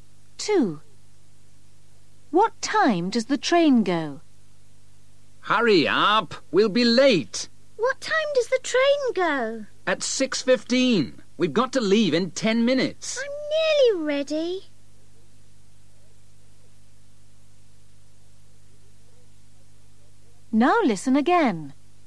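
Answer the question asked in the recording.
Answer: 6:15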